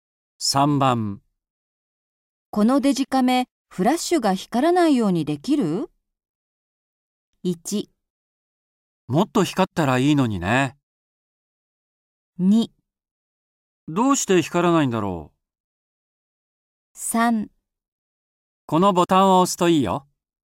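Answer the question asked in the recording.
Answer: 3: このボタンを押すといいよ。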